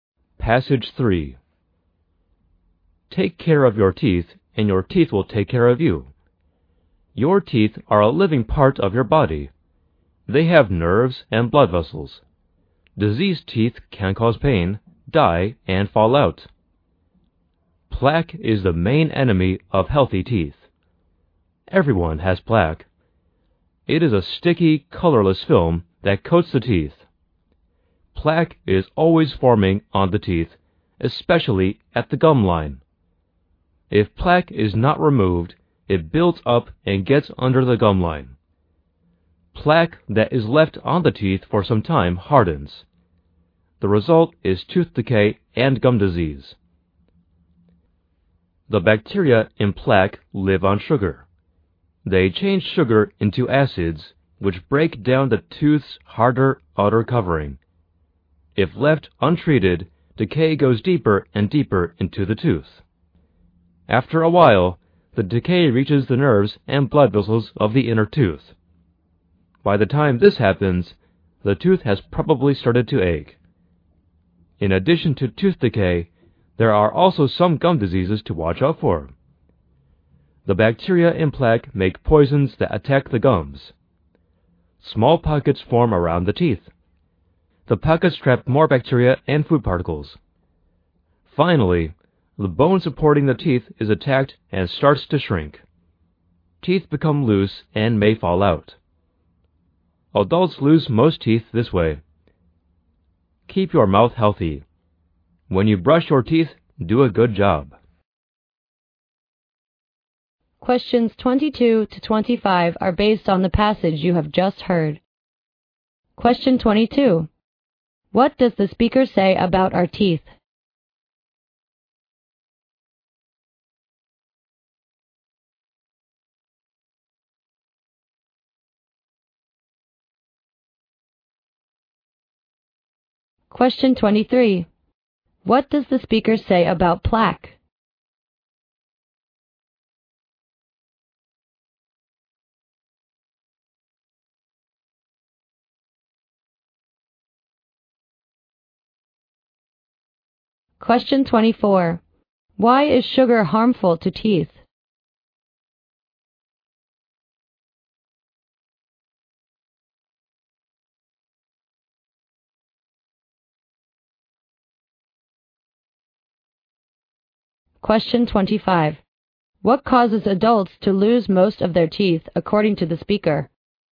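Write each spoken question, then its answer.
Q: What does the speaker say about our teeth?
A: They are a living part of the body, with nerves and blood vessels.

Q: What does the speaker say about plaque?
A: It is the main enemy of healthy teeth; it is a sticky, colorless film that is always forming on the teeth.

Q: Why is sugar harmful to teeth?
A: Bacteria in plaque change sugar into acids that break down the tooth's outer covering.

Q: What causes adults to lose most of their teeth, according to the speaker?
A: Gum disease.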